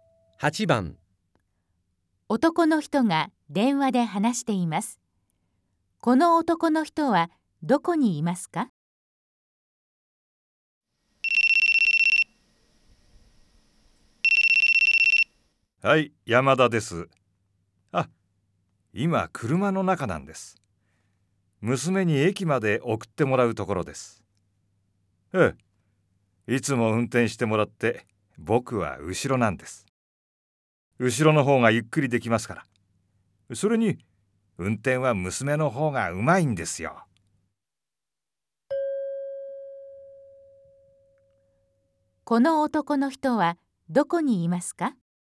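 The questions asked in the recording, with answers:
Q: この男の人はどこにいますか?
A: 車の後ろの席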